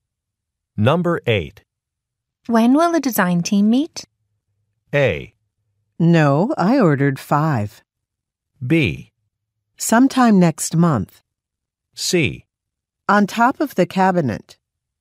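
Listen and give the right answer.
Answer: B: Sometime next month.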